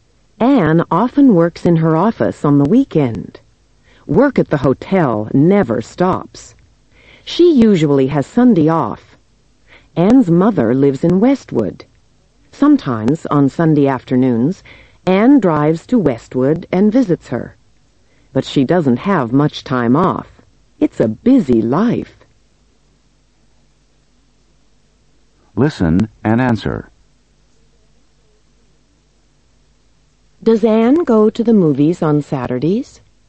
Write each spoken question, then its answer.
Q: Does Anne go to the movies on Saturdays?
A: No, she doesn't.